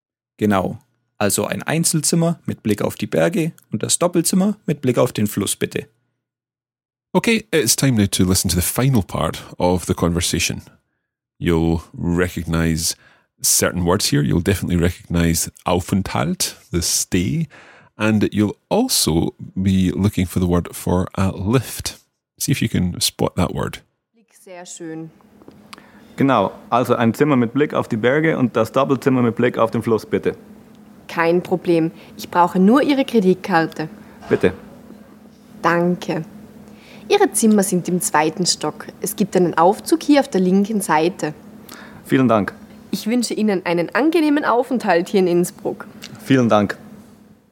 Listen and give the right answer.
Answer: So the Aufzug is the lift.